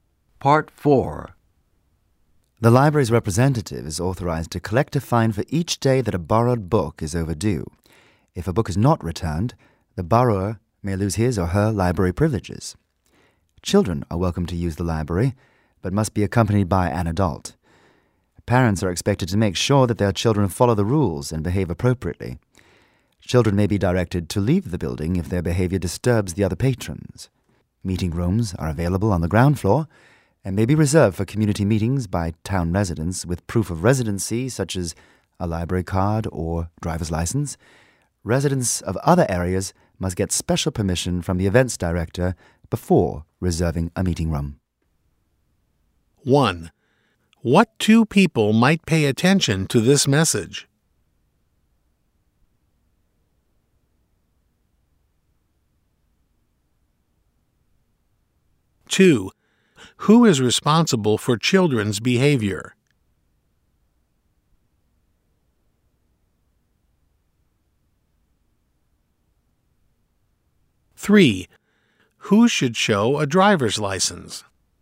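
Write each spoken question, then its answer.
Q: Who is responsible for children's behavior?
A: Parents

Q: Who should show a driver's license?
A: Town residents reserving a meeting room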